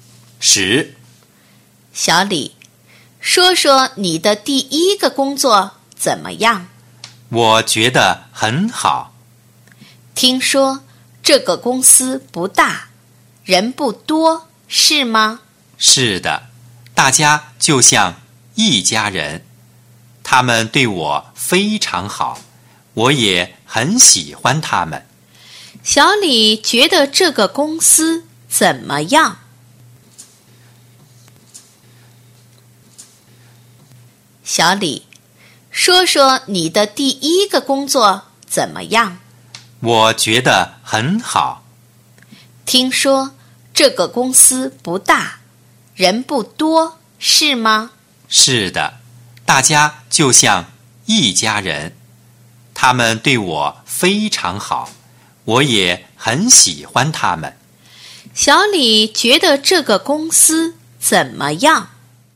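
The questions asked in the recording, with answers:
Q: 小李觉得这个公司怎么样?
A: 很好,大家像一家人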